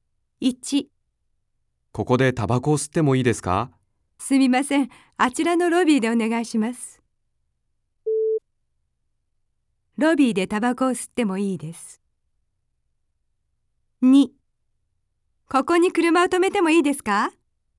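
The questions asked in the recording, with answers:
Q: ロビーでタバコを吸ってもいいです。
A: 正しい(○)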